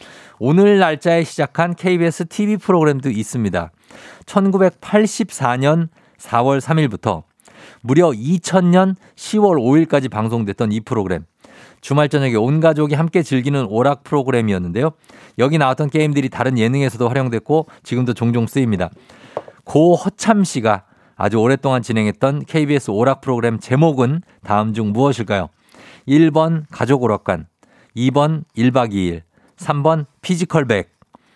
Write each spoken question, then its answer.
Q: 고 허참 씨가 아주 오랫동안 진행했던 KBS 오락 프로그램 제목은 다음 중 무엇일까요?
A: 자, 정답 발표하면 정답 바로 가족 오락관이죠.